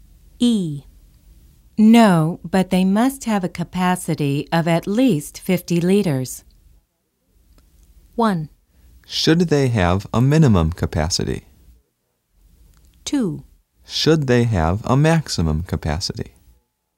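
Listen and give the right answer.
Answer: 2: Should they have a maximum capacity?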